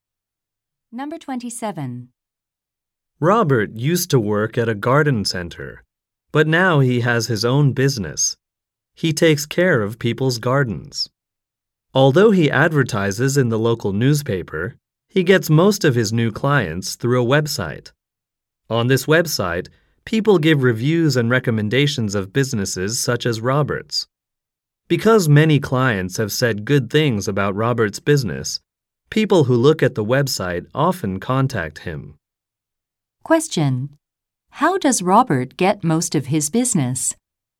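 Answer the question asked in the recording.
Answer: Through a review website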